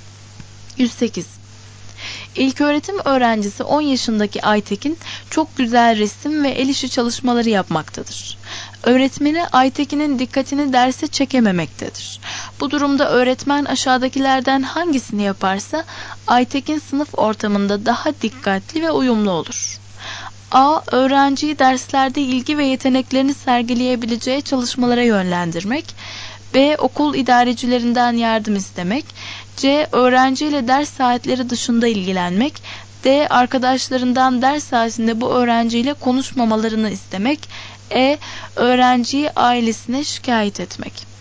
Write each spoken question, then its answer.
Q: Bu durumda öğretmen aşağıdakilerden hangisini yaparsa Aytekin sınıf ortamında daha dikkatli ve uyumlu olur.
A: Doğru cevap A.